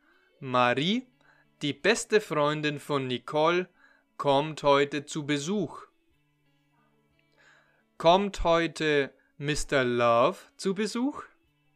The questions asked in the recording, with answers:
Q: Kommt heute Mr. Love zu Besuch?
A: Nein, Mr. Love kommt nicht zu Besuch sondern Marie.